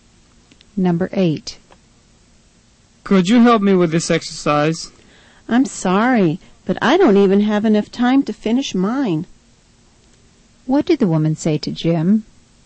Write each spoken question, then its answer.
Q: What did the woman say to Jim?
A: She had no time at all to help him.